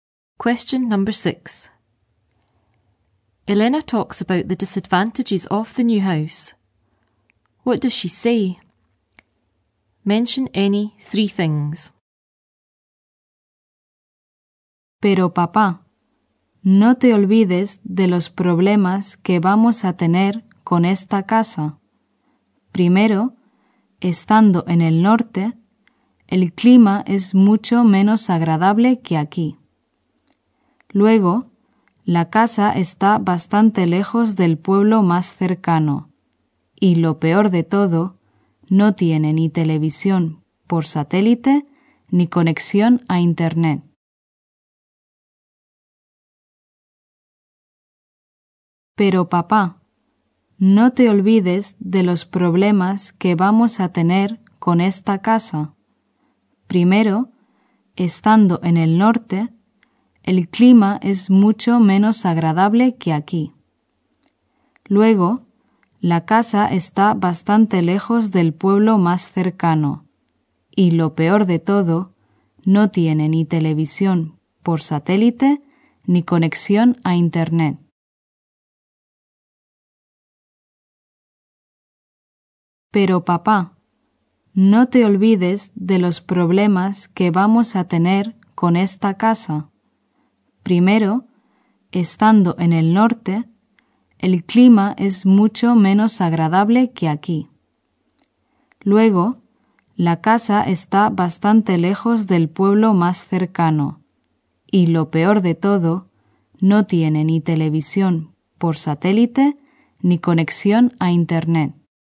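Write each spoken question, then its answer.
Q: What does she say? Mention any 3 things.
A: Climate much less pleasant in the north; house quite far from nearest village; no satellite TV or internet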